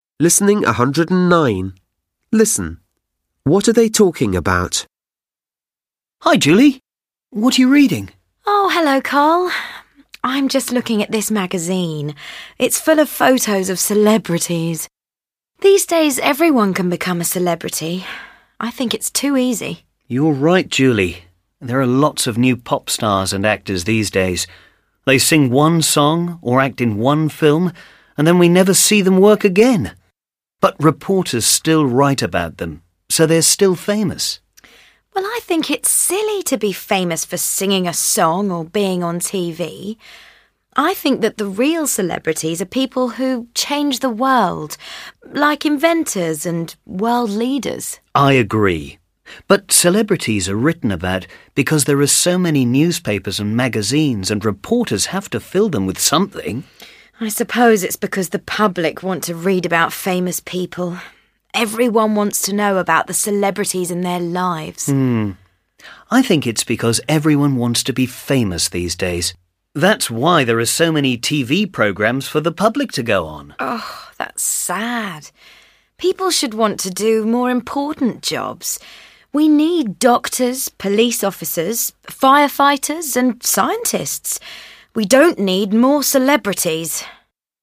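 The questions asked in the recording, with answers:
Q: What are they talking about?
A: Celebrities and why so many people are famous these days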